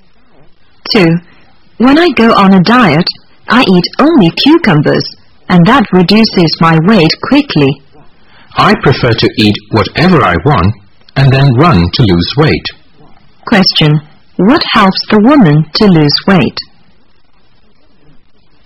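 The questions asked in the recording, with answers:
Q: What helps the woman to lose weight?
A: Running (exercise)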